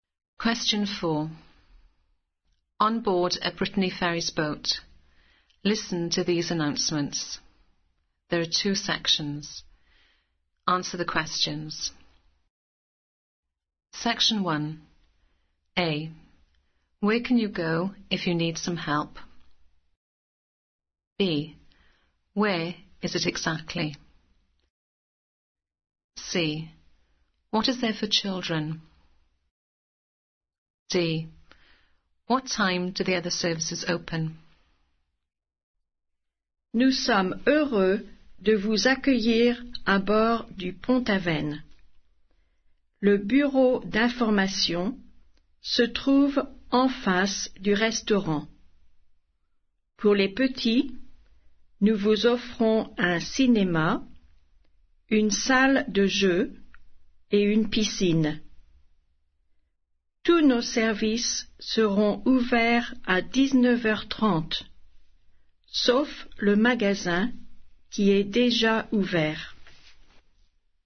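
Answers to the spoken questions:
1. The information office
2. Opposite the restaurant
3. A cinema, a games room and a swimming pool
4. 7:30 pm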